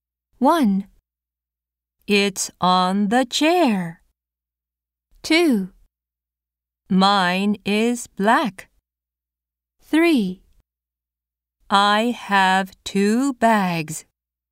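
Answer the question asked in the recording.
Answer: 1: It's on the chair.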